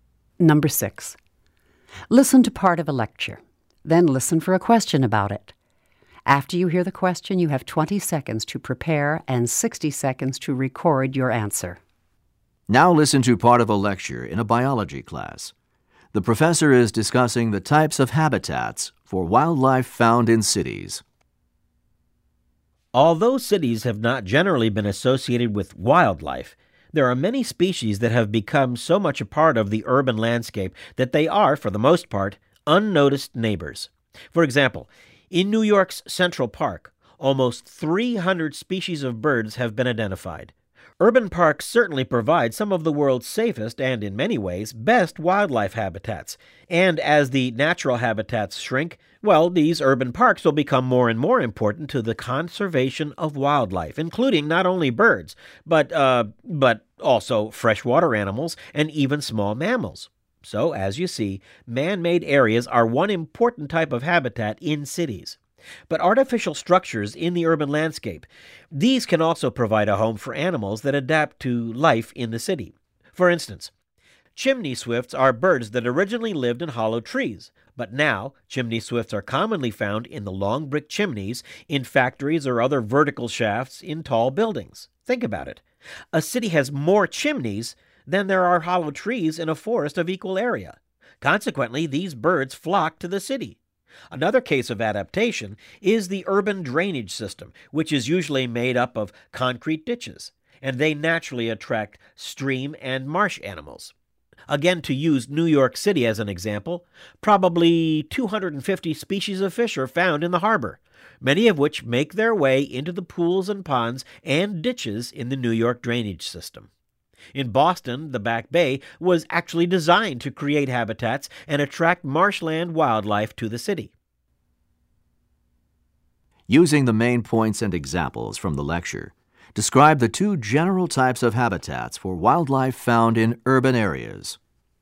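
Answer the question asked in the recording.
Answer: Man-made areas such as urban parks (e.g. Central Park's birds), and artificial structures animals adapt to, such as chimneys (chimney swifts) and drainage systems (fish, marsh animals)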